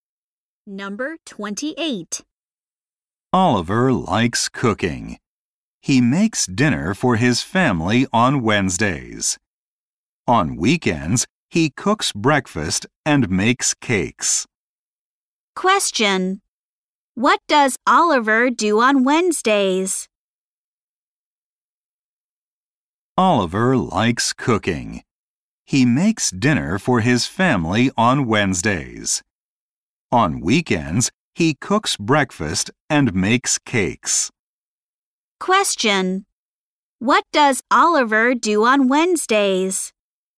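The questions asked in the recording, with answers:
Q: Question. What does Oliver do on Wednesdays?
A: He makes dinner for his family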